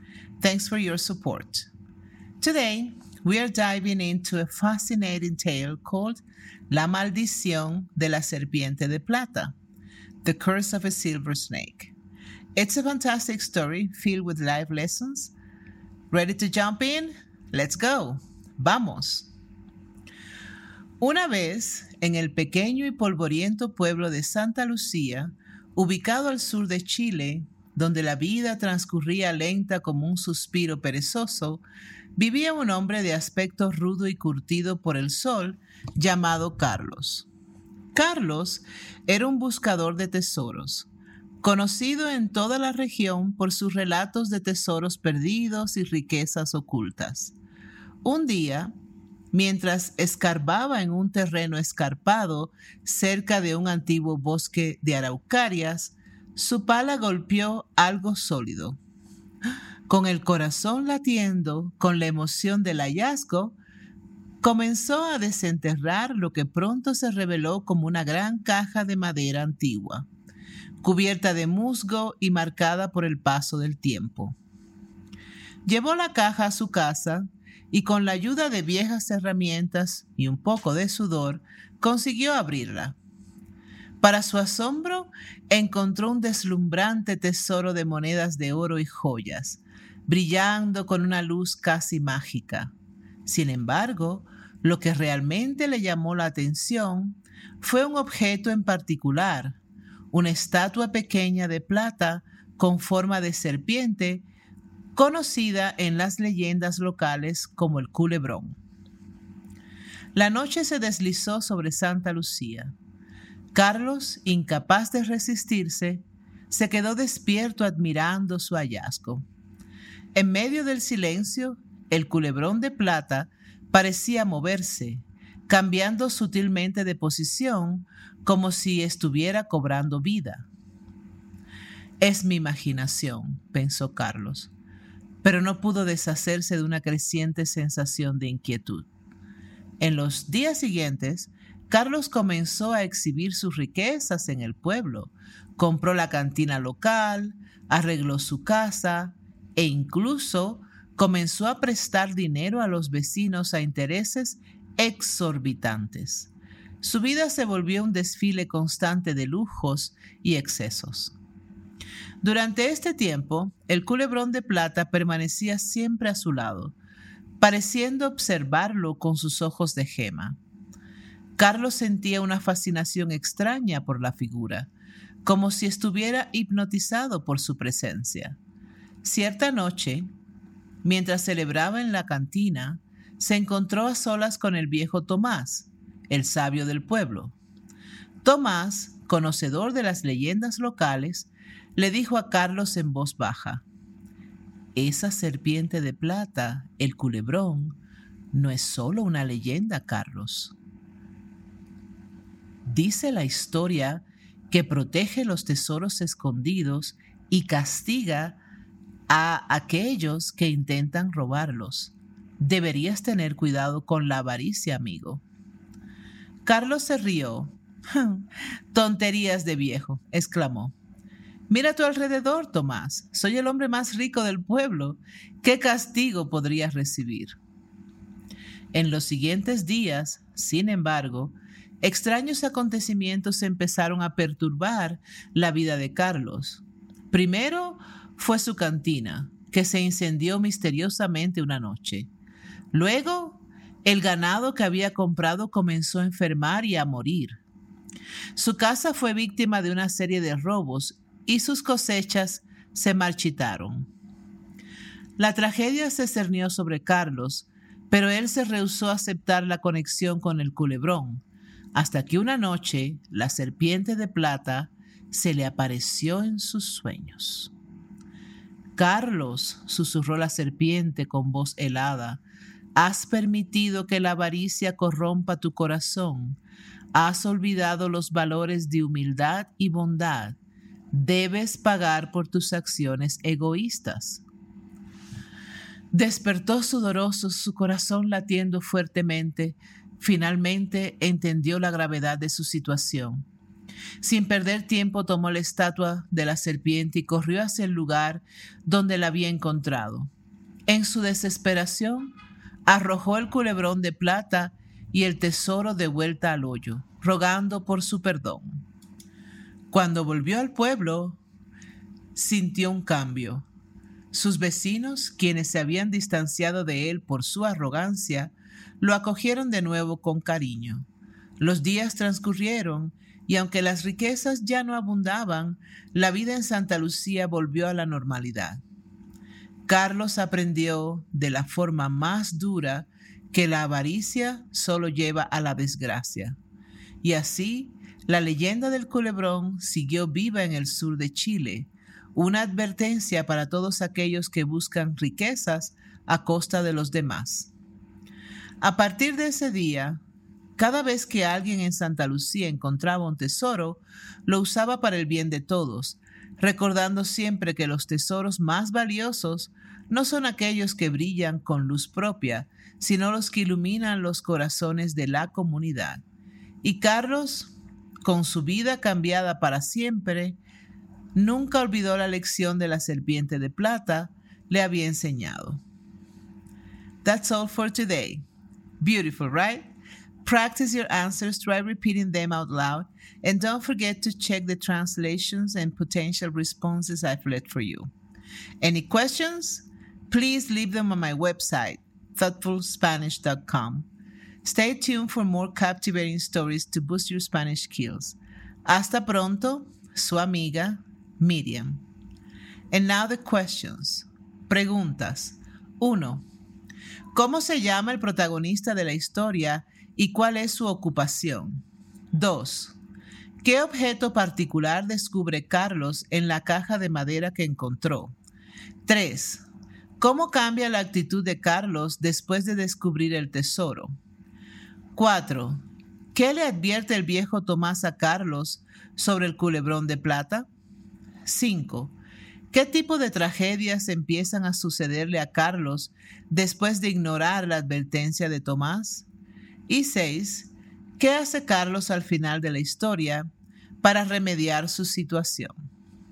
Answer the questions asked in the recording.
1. El protagonista de la historia se llama Carlos y es un buscador de tesoros.
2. Carlos descubre una estatua de una serpiente de plata, conocida como el culebrón.
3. Después de descubrir el tesoro, Carlos se vuelve más avaricioso y empieza a exhibir sus riquezas comprando cosas caras y prestando dinero a intereses altos.
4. El viejo Tomás advierte a Carlos que el culebrón protege los tesoros escondidos y castiga a aquellos que intentan robarlos, instándolo a tener cuidado con su avaricia.
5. Después de ignorar la advertencia de Tomás, a Carlos le sucede una serie de desgracias, incluyendo un incendio en su cantina, su ganado enferma y muere, su casa es robada y sus cosechas se marchitan.
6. Para remediar su situación, Carlos devuelve el culebrón de plata y el resto del tesoro al lugar donde lo encontró, rogando por su perdón.